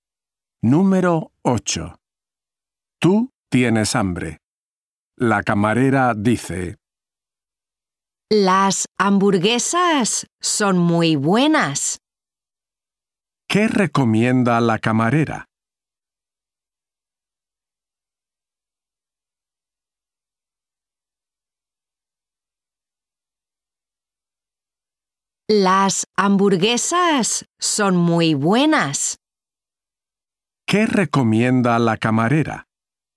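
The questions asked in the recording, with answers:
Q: ¿Qué recomienda la camarera?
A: Las hamburguesas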